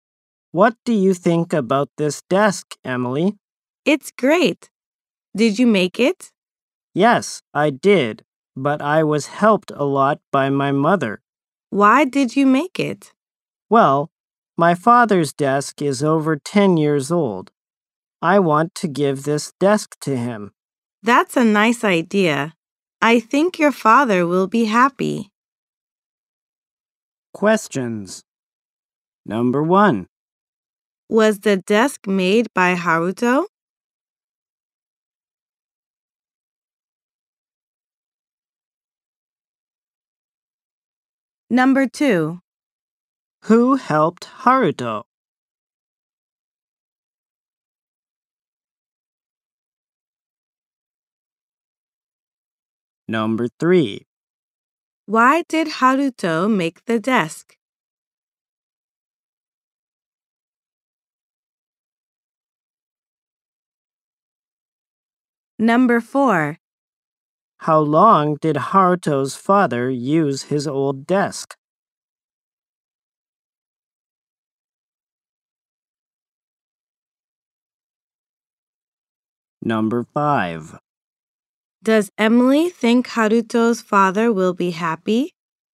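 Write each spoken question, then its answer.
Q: Was the desk made by Haruto?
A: Yes, it was.

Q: Who helped Haruto?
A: His mother did.

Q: Why did Haruto make the desk?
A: To give it to his father, whose desk is over 10 years old.

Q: Does Emily think Haruto's father will be happy?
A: Yes, she does.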